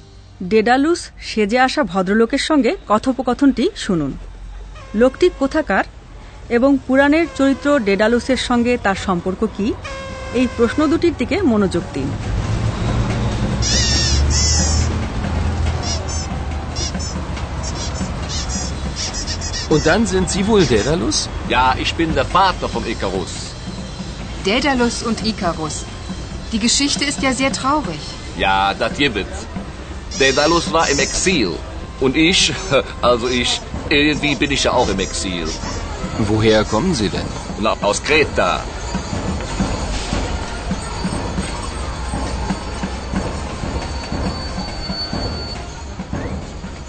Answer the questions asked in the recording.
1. Greek দ্বীপ crate বা Creta কথাটা শুনতে পেয়েছেন আপনারা ভদ্রলোক সেখানকারী লোক
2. আর পুরাণের চরিত্র ডেডালুসও Creta দ্বীপের